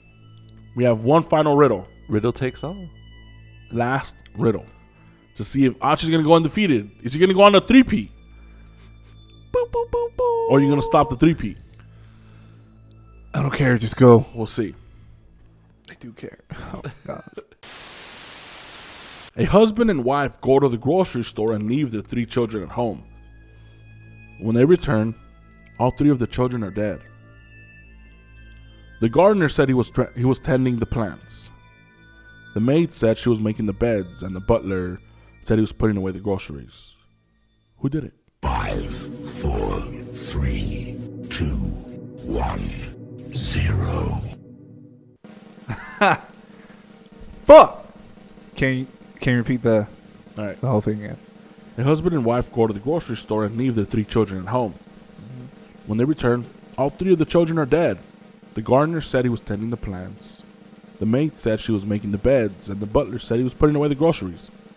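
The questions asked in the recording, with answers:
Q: Who did it?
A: The butler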